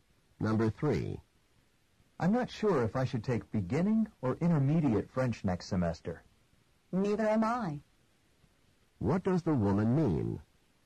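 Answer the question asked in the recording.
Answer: She's also unsure which French class to take.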